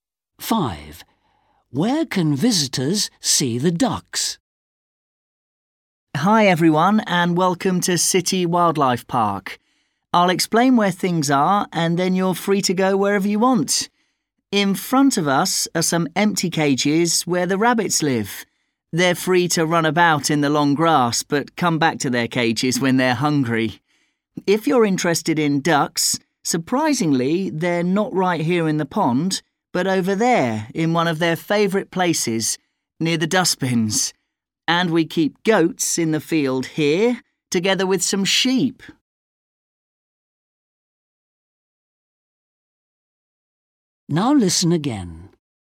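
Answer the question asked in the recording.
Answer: near the dustbins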